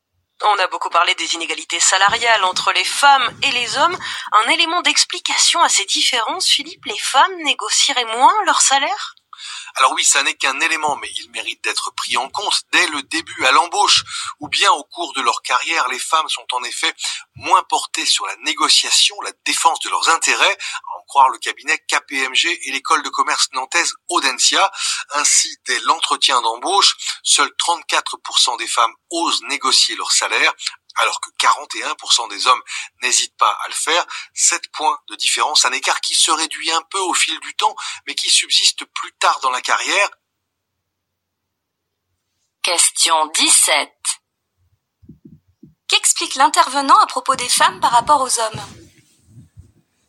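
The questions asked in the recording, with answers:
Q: Qu'explique l'intervenant à propos des femmes par rapport aux hommes ?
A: Elles négocient moins leur salaire que les hommes (34 % contre 41 % à l'embauche).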